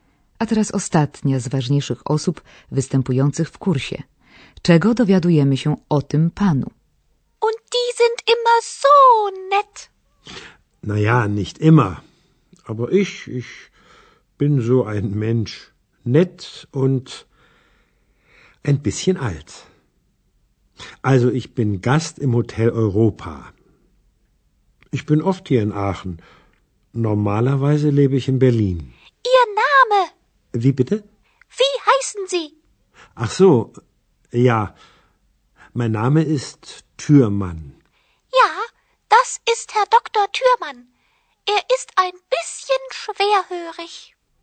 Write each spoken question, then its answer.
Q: Czego dowiadujemy się o tym panu?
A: To doktor Türmann, częsty gość w hotelu Europa.